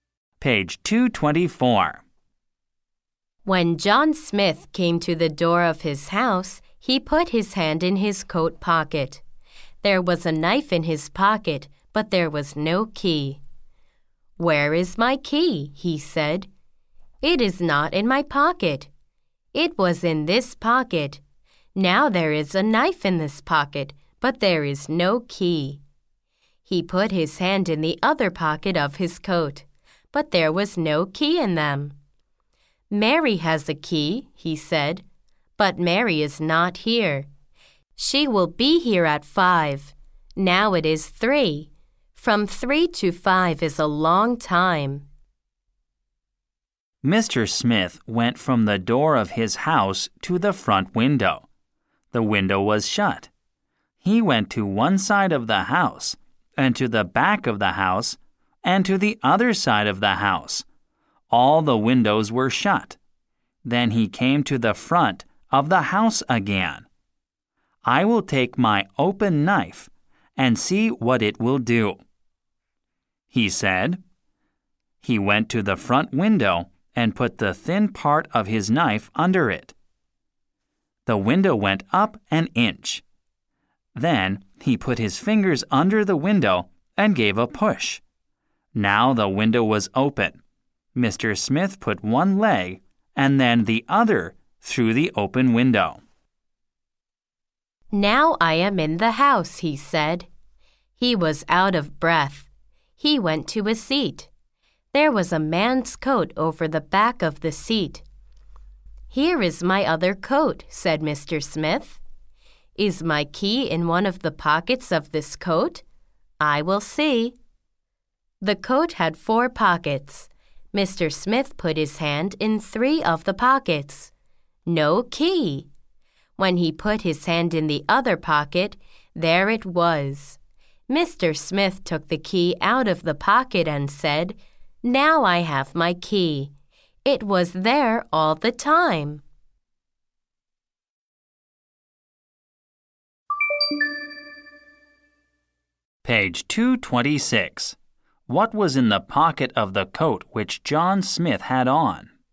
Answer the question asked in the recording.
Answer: There was a knife in the pocket of the coat which John Smith